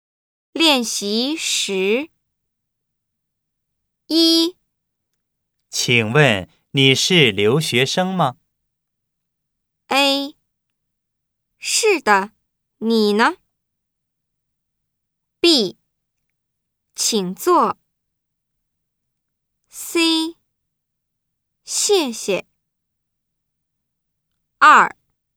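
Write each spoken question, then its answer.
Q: 请问你是留学生吗?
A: A: 是的,你呢?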